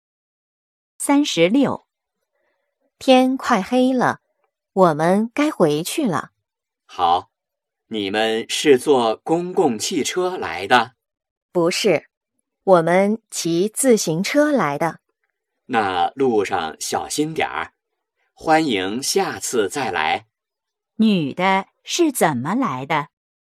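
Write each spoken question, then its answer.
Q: 女的是怎么来的?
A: 骑自行车来的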